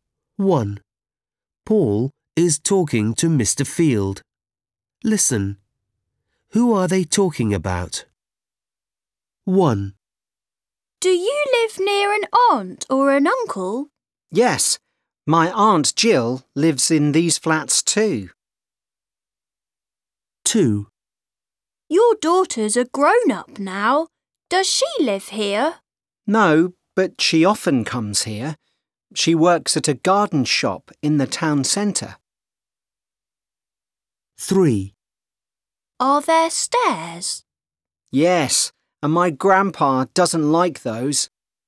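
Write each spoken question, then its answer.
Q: Who are they talking about?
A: Mr. Field's daughter

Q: Who are they talking about?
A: Grandpa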